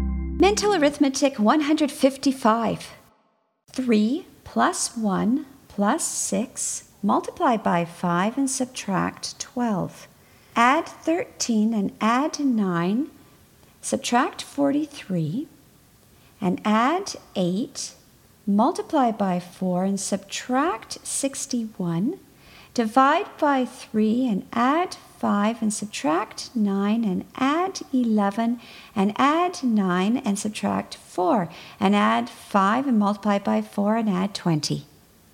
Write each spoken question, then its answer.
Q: 3 plus 1 plus 6, multiply by 5 and subtract 12. Add 13 and add 9, subtract 43, and add 8, multiply by 4 and subtract 61, divide by 3 and add 5 and subtract 9 and add 11 and add 9 and subtract 4 and add 5 and multiply by 4 and add 20.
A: 140.